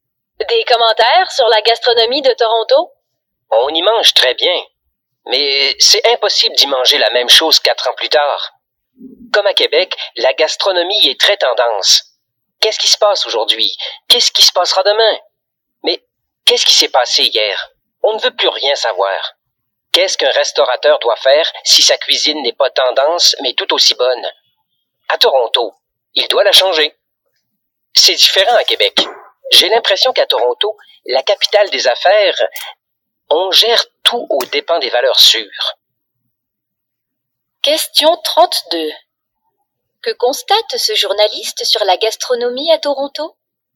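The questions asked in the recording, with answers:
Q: Que constate ce journaliste sur la gastronomie à Toronto?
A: Elle suit les tendances et change sans cesse : on y mange très bien, mais jamais la même chose quelques années plus tard.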